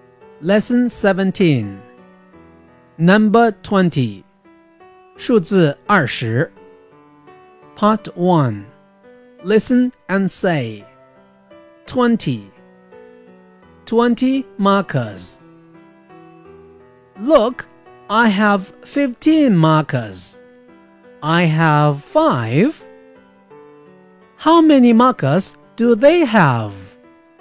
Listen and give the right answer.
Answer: 20